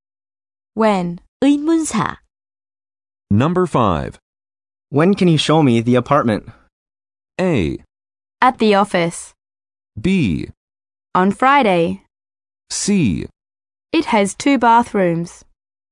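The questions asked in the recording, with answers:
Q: When can you show me the apartment?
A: B: On Friday.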